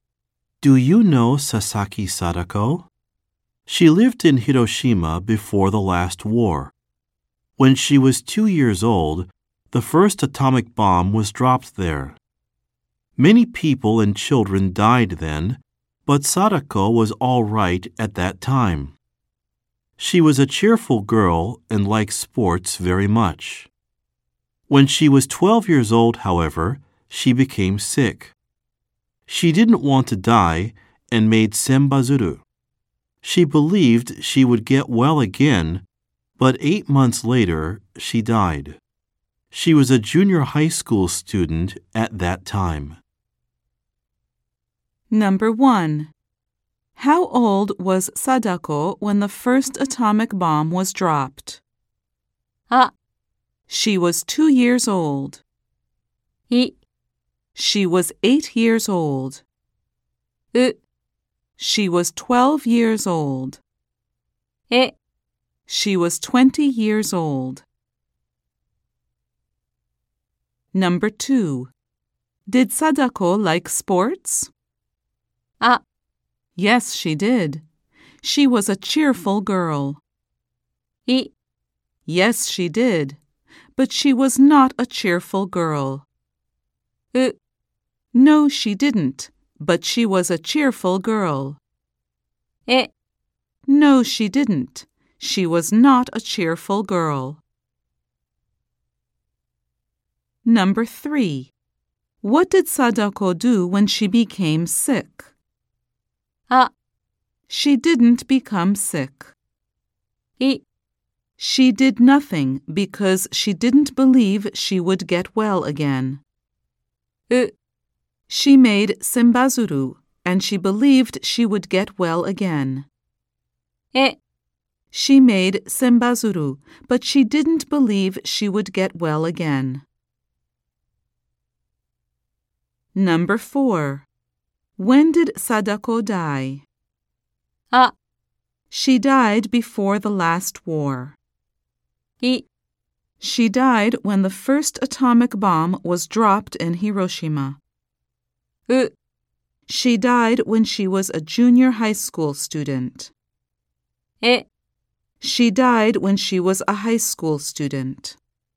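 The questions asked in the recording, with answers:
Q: How old was Sadako when the first atomic bomb was dropped?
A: あ: She was 2 years old.

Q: Did Sadako like sports?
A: あ: Yes, she did. She was a cheerful girl.

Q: What did Sadako do when she became sick?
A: う: She made senbazuru, and she believed she would get well again.

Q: When did Sadako die?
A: う: She died when she was a junior high school student.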